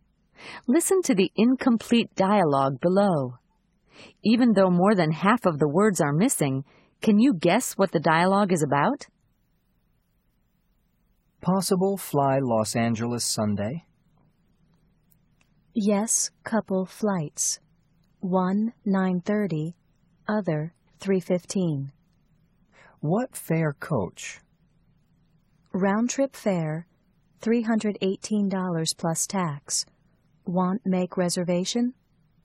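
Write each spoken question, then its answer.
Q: Even though more than half of the words are missing, can you guess what the dialogue is about?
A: Booking a flight to Los Angeles on Sunday (asking about flight times and the fare)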